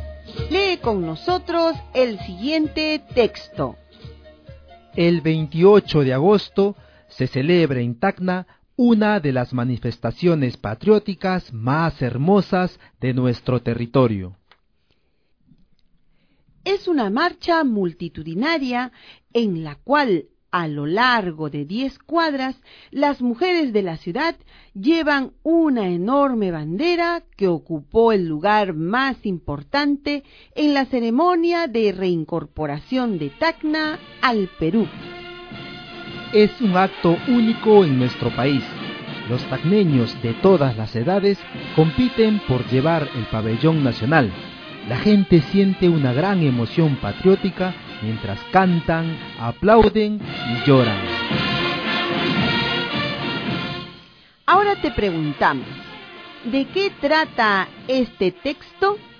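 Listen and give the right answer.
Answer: De la marcha patriótica del 28 de agosto en Tacna, en la que las mujeres llevan una enorme bandera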